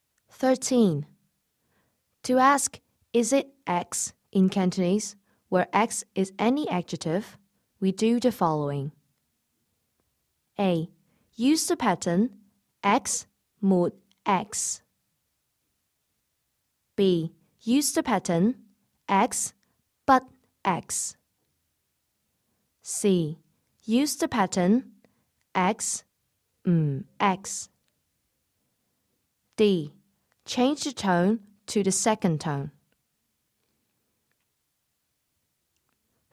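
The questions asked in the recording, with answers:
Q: To ask, is it X in Cantonese, where X is any adjective, we do the following.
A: A: Use the pattern X mod X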